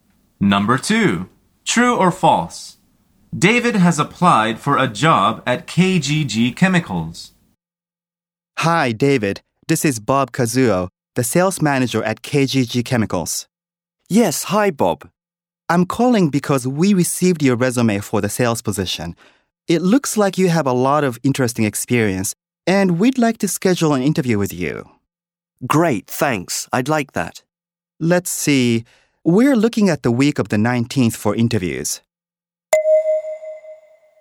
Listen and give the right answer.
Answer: The answer is true.